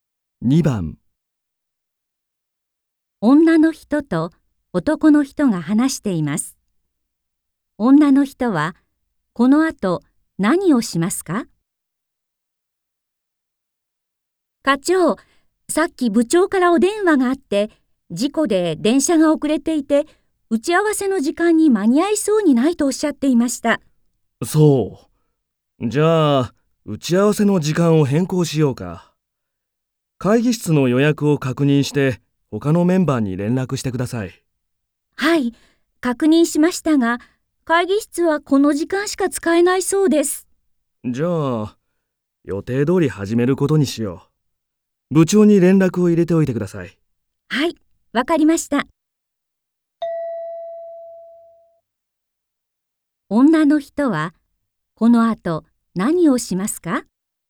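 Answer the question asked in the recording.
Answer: 部長に連絡する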